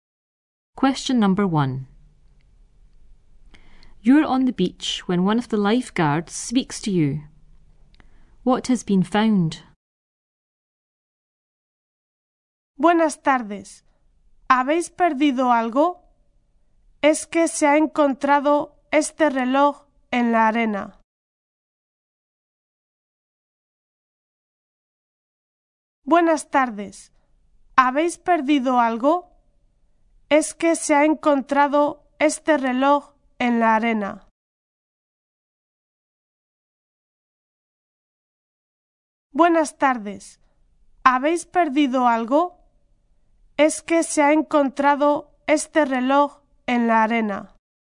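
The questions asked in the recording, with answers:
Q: What has been found?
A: A watch, in the sand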